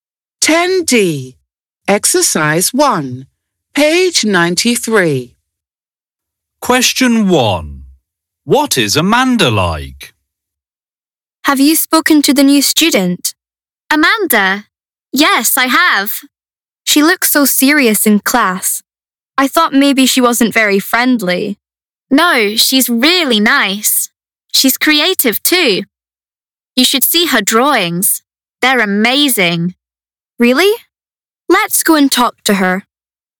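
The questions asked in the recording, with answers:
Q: What is Amanda like?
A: She's really nice and creative.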